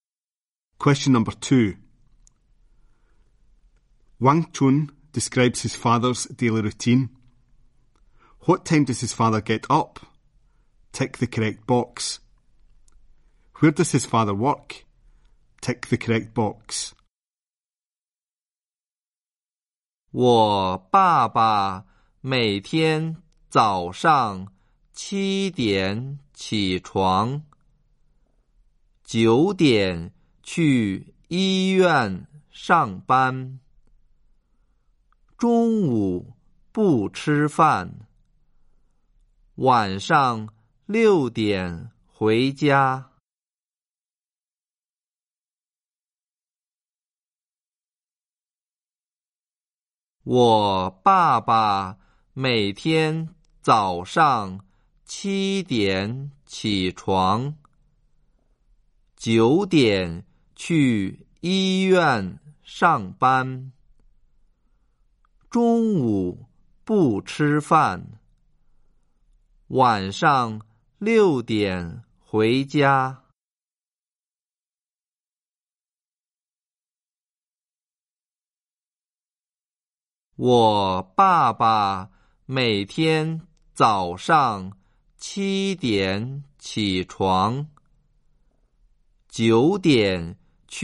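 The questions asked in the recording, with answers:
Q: What time does his father get up?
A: 7 o'clock

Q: Where does his father work?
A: At a hospital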